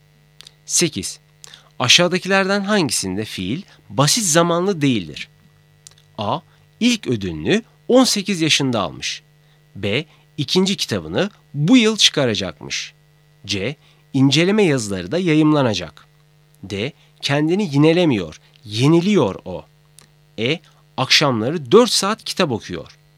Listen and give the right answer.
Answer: Doğru cevap B. İkinci kitabını bu yıl çıkaracakmış.